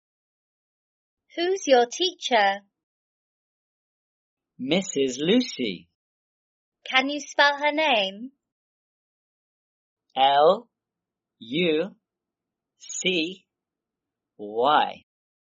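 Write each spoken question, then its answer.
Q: Can you spell her name?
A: L-U-C-Y (Lucy)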